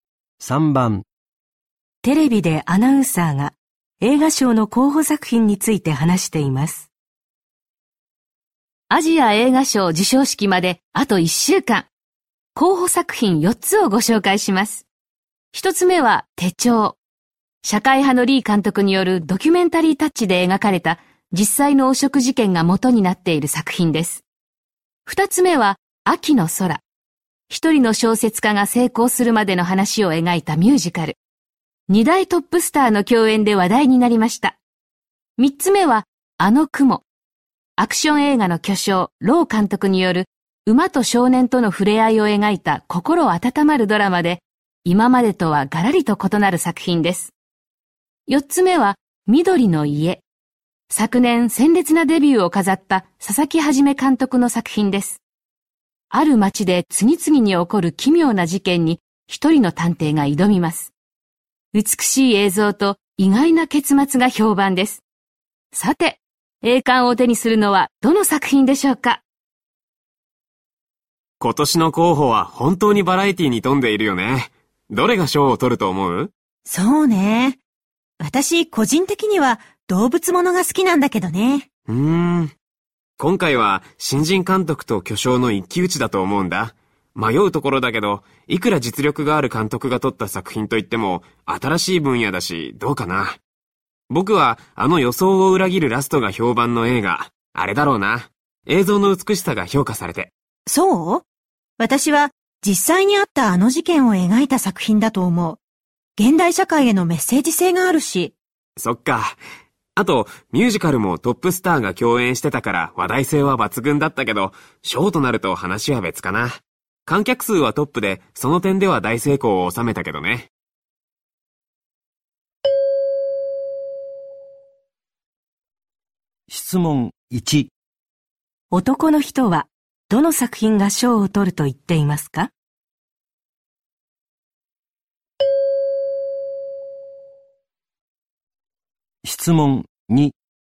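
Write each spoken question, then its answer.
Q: 男の人はどの作品が賞を取ると言っていますか?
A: 緑の家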